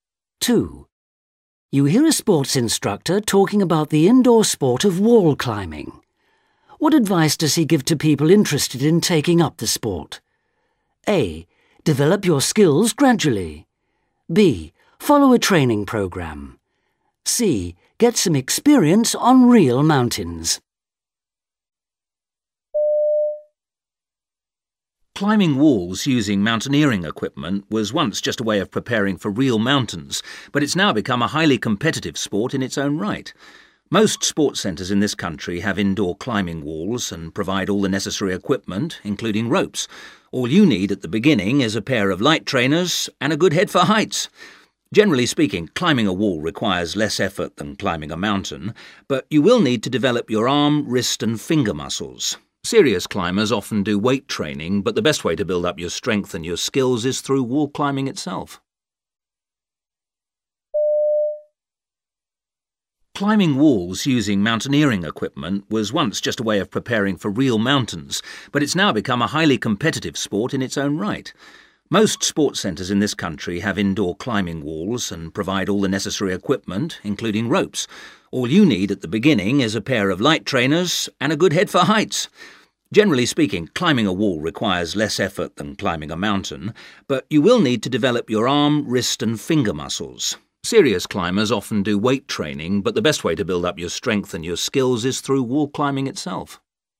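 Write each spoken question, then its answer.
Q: What advice does he give to people interested in taking up the sport?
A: A: Develop your skills gradually.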